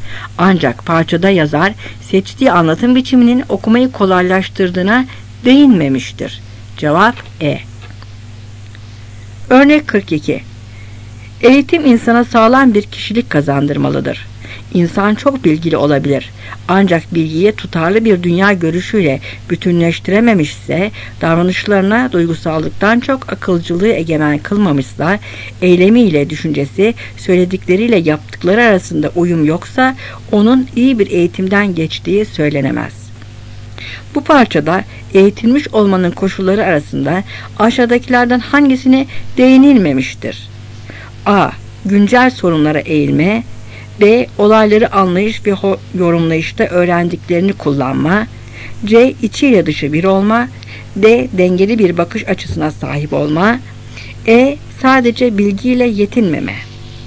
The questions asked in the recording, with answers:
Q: Bu parçada eğitilmiş olmanın koşulları arasında aşağıdakilerden hangisine değinilmemiştir?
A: Cevap A.